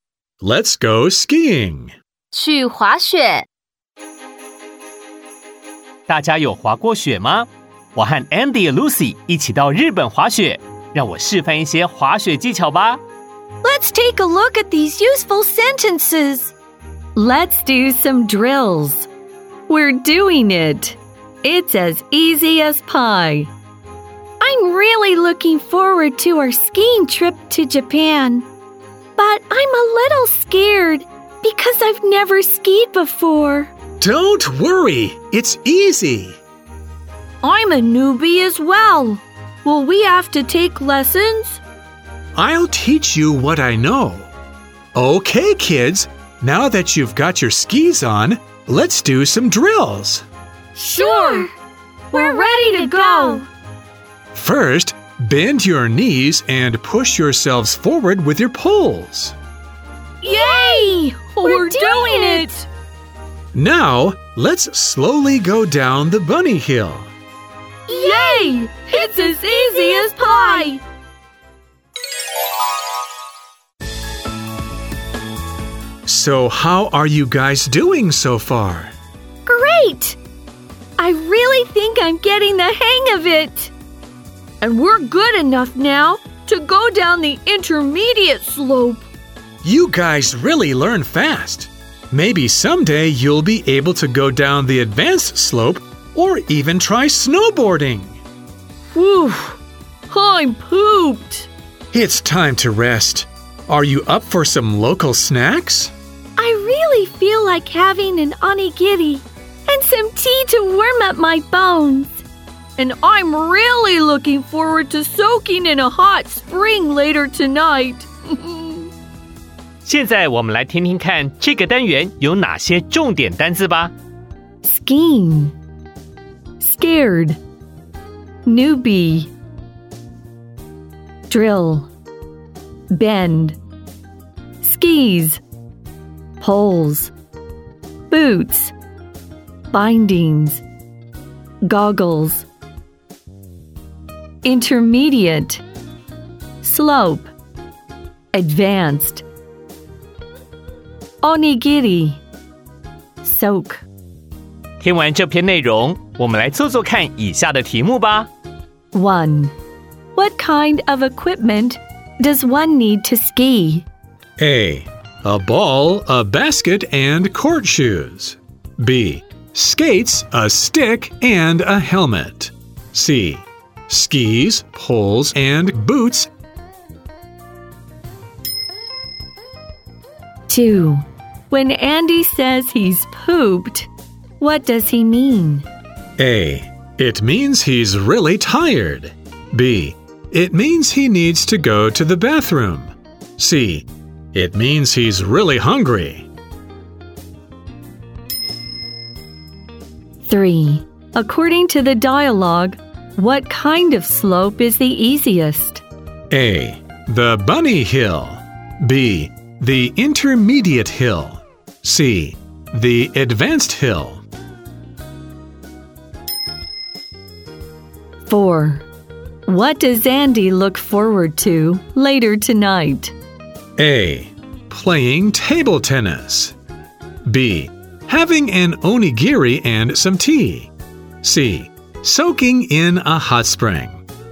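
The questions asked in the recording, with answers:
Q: what kind of equipment does one need to ski?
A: C: Skis, poles, and boots.

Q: When Andy says he's pooped, what does he mean?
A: A: It means he's really tired.

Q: According to the dialogue, what kind of slope is the easiest?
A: A: The bunny hill.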